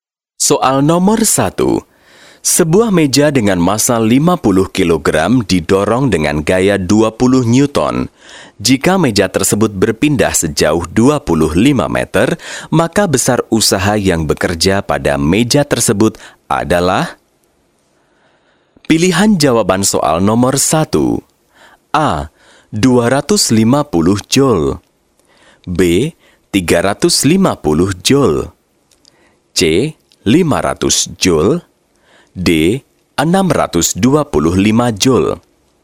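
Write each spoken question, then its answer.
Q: Jika meja tersebut berpindah sejauh 25 meter, maka besar usaha yang bekerja pada meja tersebut adalah?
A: C: 500 Joule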